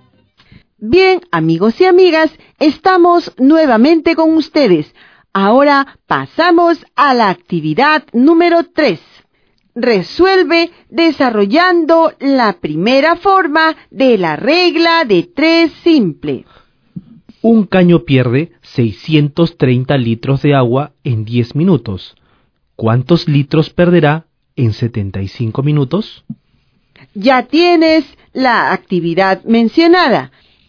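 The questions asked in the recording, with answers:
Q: ¿Cuántos litros perderá en 75 minutos?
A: 4725 litros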